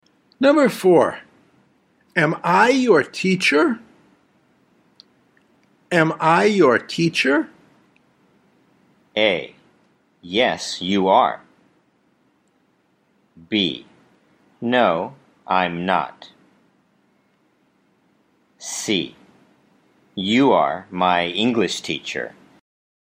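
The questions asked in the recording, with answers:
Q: am I your teacher?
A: A: Yes, you are.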